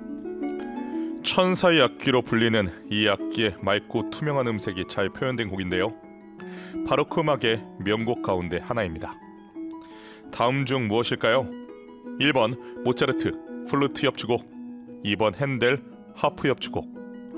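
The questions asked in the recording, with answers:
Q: 다음 중 무엇일까요?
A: 2: 핸델 하프 협주곡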